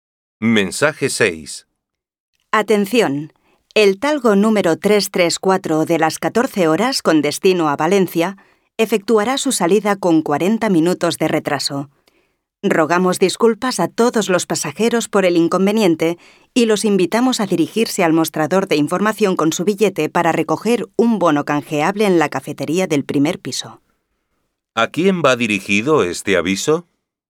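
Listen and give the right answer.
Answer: A los pasajeros del talgo 334 de las 14 horas con destino a Valencia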